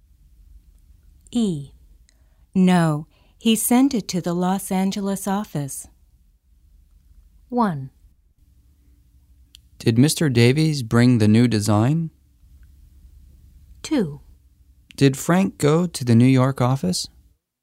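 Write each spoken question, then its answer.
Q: No, he sent it to the Los Angeles office.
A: 1: Did Mr. Davies bring the new design?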